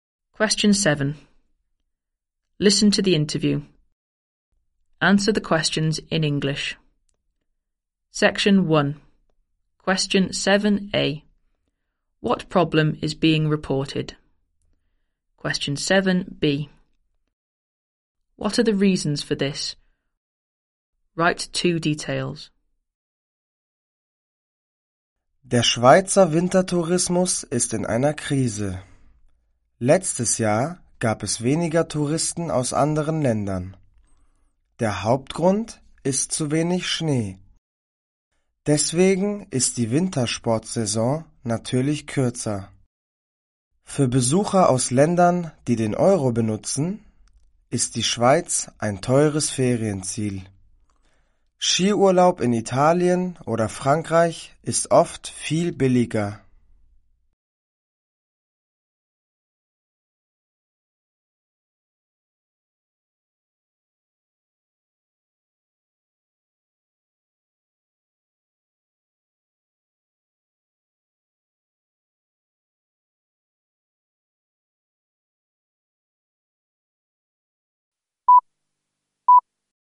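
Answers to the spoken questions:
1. Swiss winter tourism is in crisis; fewer foreign tourists
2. Too little snow (shorter season); Switzerland is expensive for euro users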